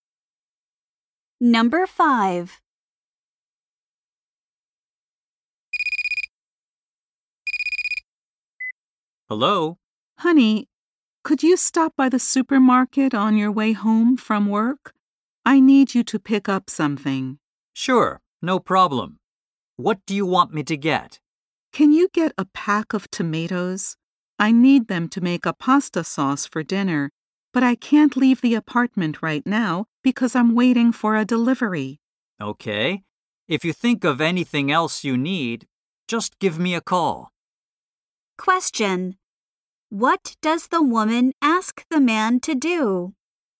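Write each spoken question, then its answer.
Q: What does the woman ask the man to do?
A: Buy tomatoes at the supermarket.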